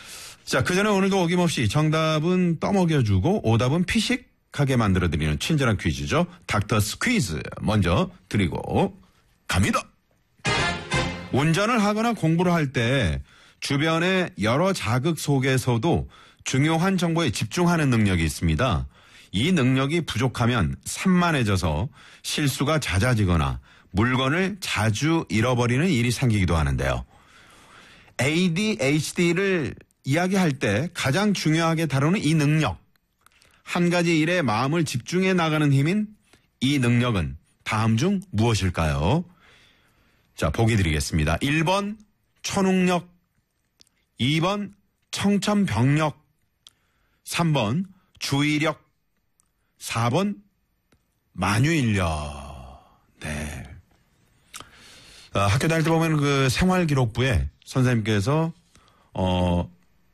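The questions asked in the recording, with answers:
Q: ADHD를 이야기할 때 가장 중요하게 다루는 이 능력, 한 가지 일에 마음을 집중해 나가는 힘인 이 능력은 다음 중 무엇일까요?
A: 3: 주의력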